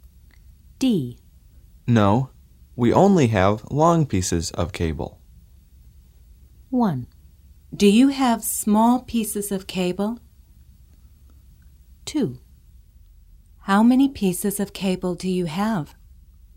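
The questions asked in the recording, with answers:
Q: No, we only have long pieces of cable.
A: 1: Do you have small pieces of cable?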